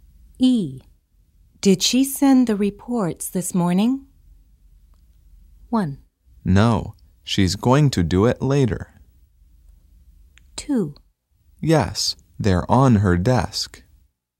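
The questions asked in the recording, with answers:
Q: Did she send the reports this morning?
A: 1: No, she's going to do it later.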